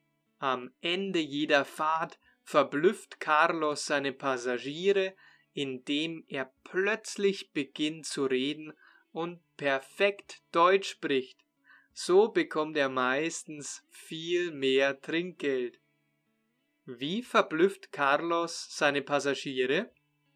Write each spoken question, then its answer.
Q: Wie verblüfft Carlos seine Passagiere?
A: Indem er plötzlich beginnt zu reden und perfektes Deutsch spricht.